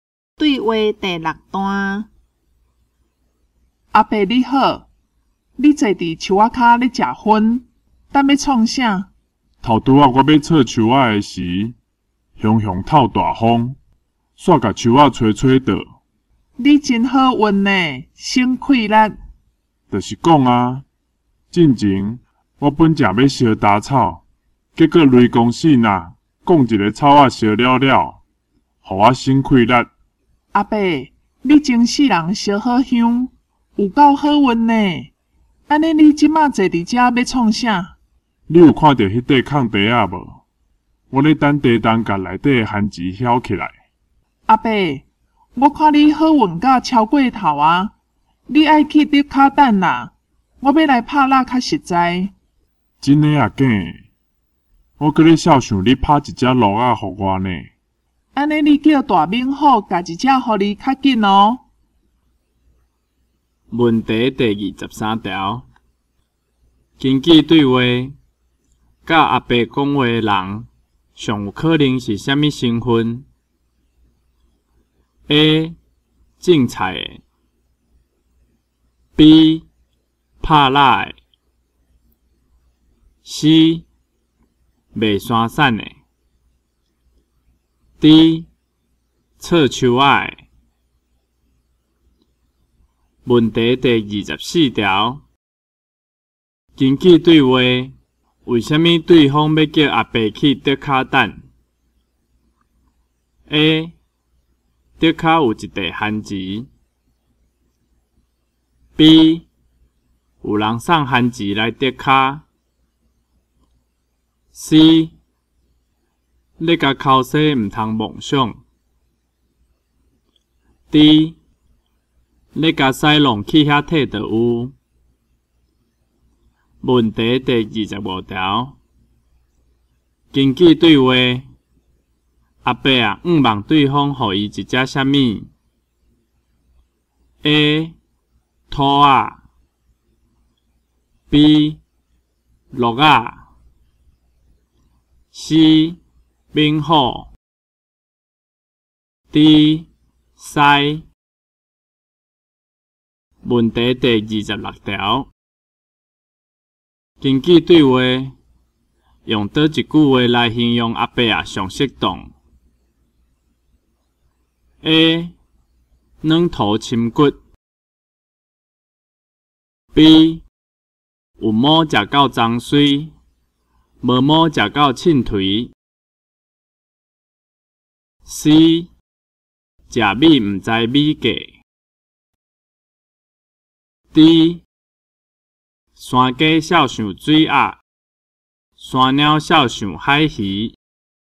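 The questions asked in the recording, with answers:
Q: 根据对话,甲阿伯讲话的人上有可能是虾米身份?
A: B: 拍蜡的

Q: 根据对话,阿伯啊,希望对方予伊一只啥物 ?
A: B: 鹿仔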